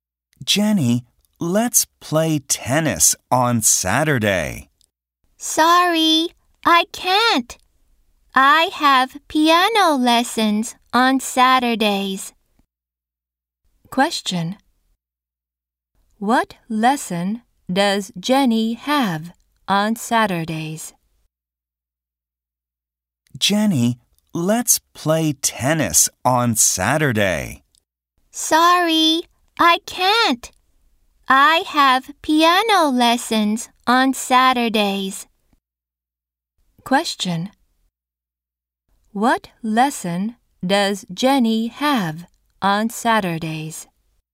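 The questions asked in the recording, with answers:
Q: What lesson does Jenny have on Saturdays?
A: Piano lessons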